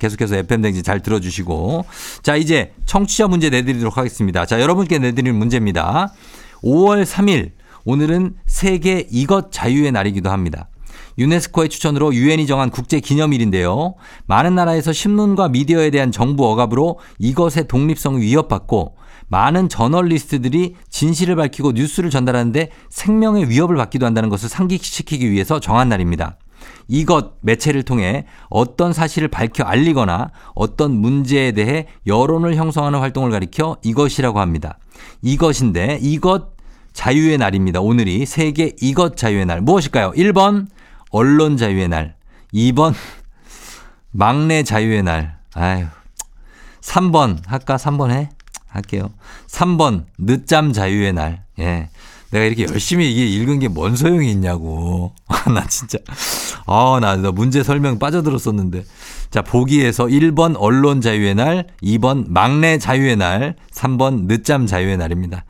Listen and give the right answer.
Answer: 정답 바로 언론이죠. 예, 언론 자유의 날입니다.